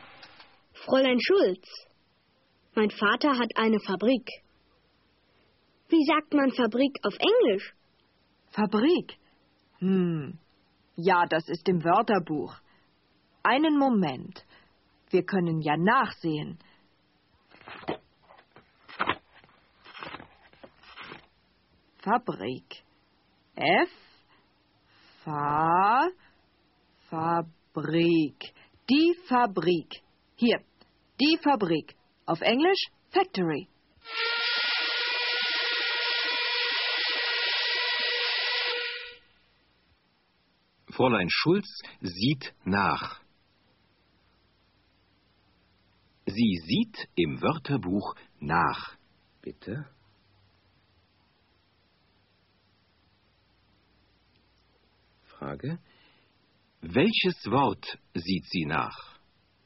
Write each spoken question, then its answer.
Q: Welches Wort sieht sie nach?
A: Sie sieht das Wort Fabrik nach.